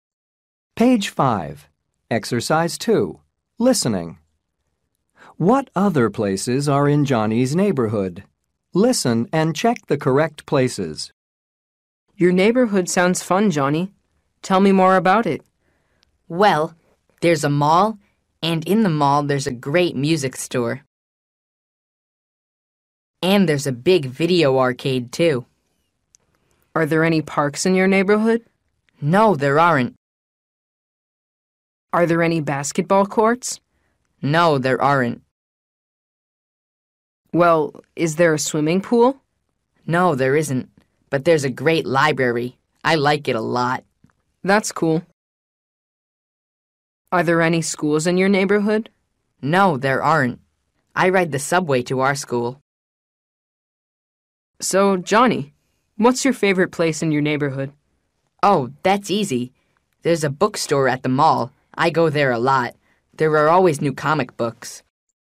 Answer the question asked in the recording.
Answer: میوزیک استور، مغازه موسیقی که سی‌دی‌های موسیقی و آلبوم‌های موسیقی می‌فروشه.